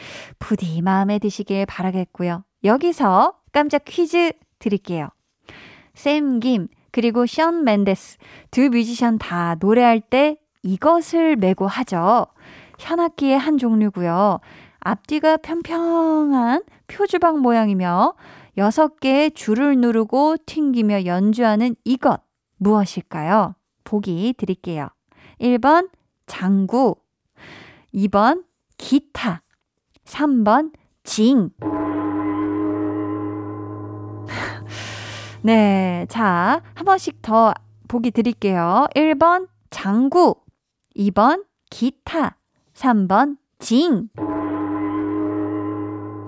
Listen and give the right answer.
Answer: 정답은 2번 기타였습니다.